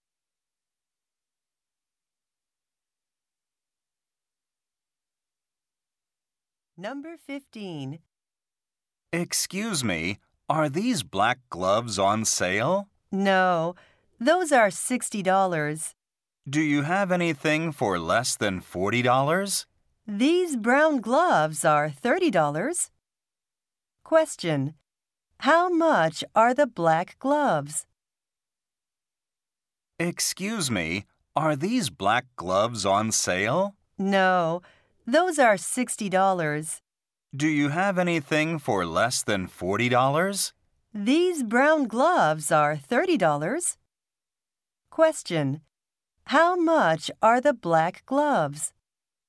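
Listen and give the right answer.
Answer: $60.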